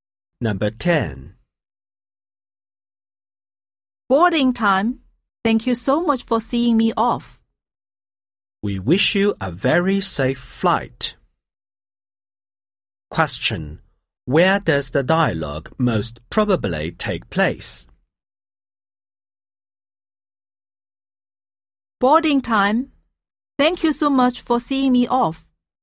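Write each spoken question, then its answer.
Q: Where does the dialogue most probably take place?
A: At the airport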